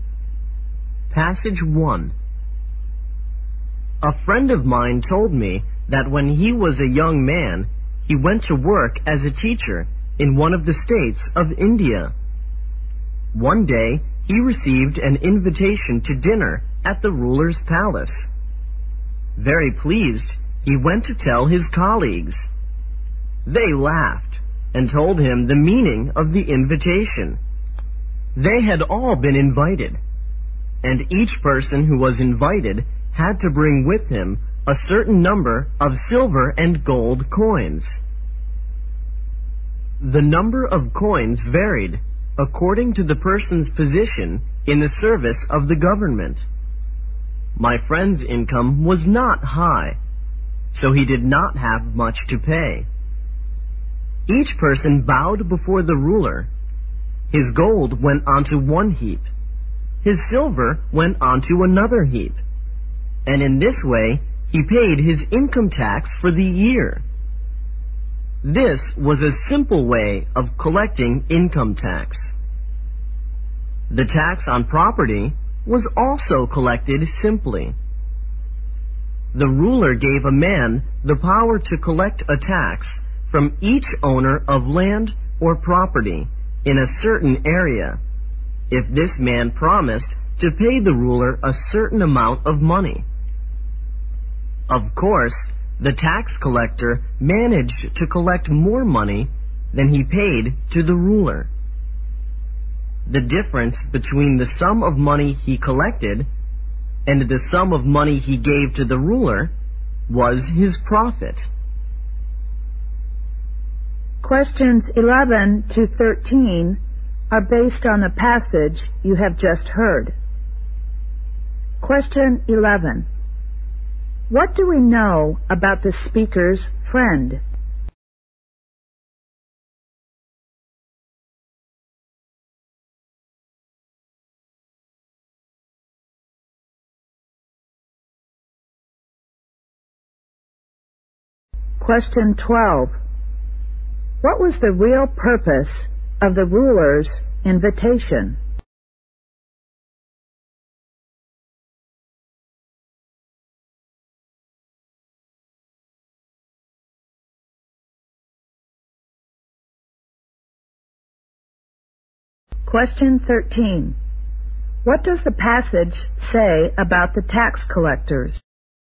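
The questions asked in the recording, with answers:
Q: What was the real purpose of the ruler's invitation?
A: To collect income tax

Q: What does the passage say about the tax collectors?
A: They collected more money than they paid the ruler and kept the difference as profit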